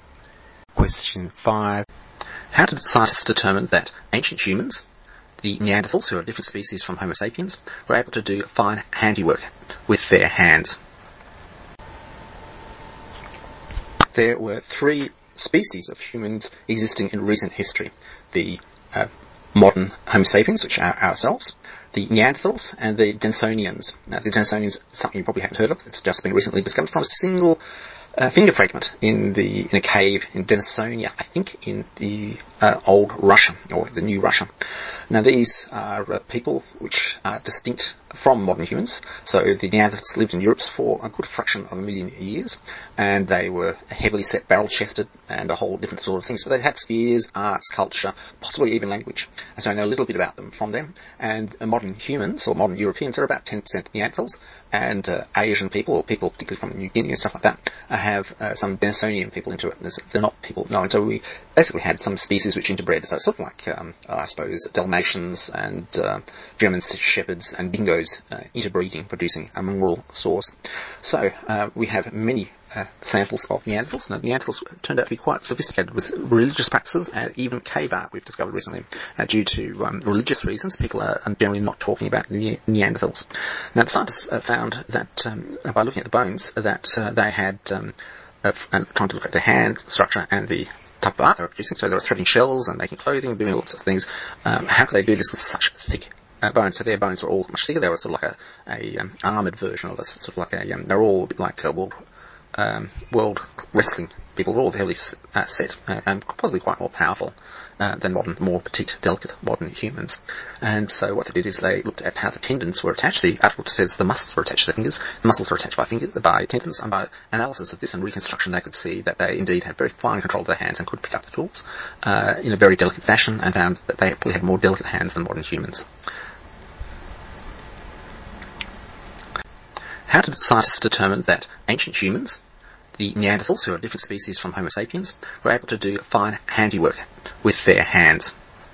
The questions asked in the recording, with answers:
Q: How did scientists determine that ancient humans, the Neanderthals, who are a different species from Homo sapiens, were able to do fine handiwork with their hands?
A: They looked at the connection of the muscles to the hands.